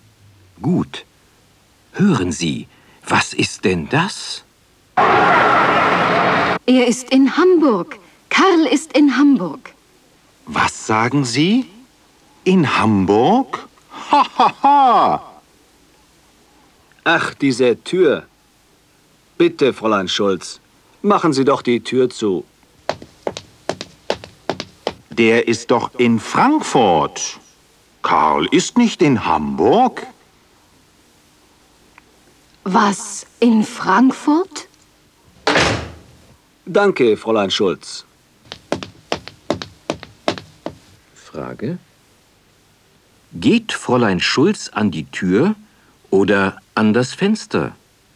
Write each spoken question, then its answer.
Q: Geht Fräulein Schulz an die Tür oder an das Fenster?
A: Sie geht an die Tür.